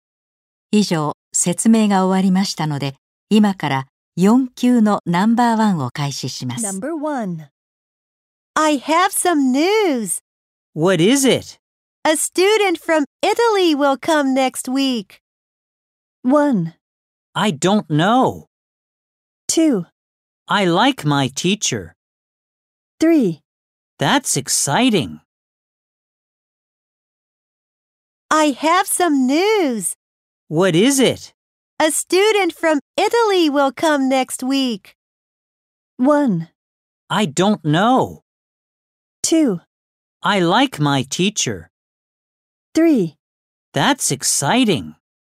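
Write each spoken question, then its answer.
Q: A student from Italy will come next week!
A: 3: That's exciting!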